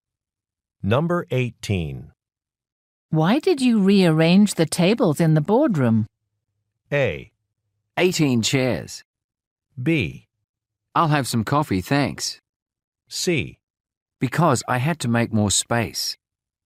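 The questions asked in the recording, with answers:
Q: Why did you rearrange the tables in the boardroom?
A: C: Because I had to make more space.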